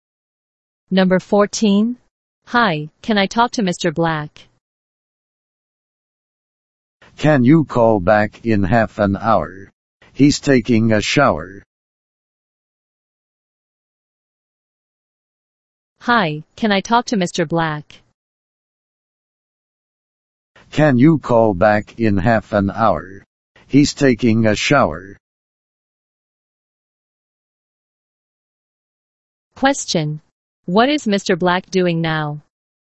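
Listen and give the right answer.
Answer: Taking a shower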